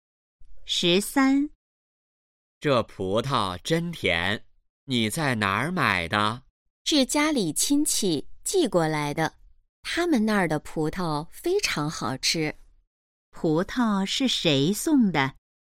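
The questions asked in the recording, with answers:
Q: 葡萄是谁送的?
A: 家里亲戚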